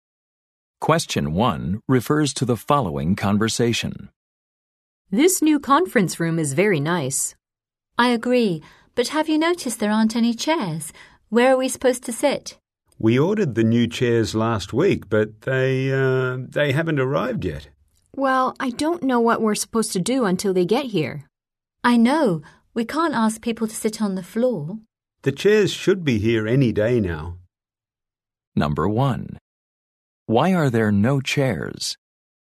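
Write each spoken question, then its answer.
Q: Why are there no chairs?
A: The ordered chairs haven't arrived yet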